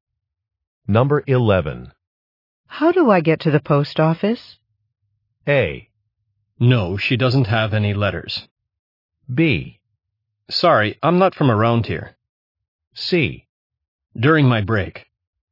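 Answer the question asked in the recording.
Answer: B: Sorry, I'm not from around here.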